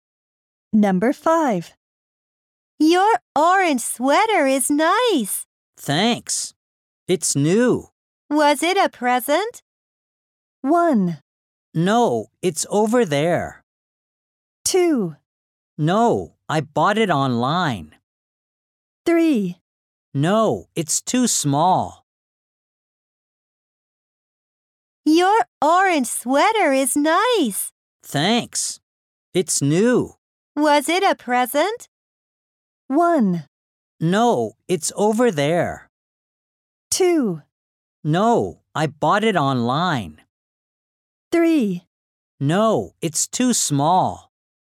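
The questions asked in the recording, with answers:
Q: Was it a present?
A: 2: No, I bought it online.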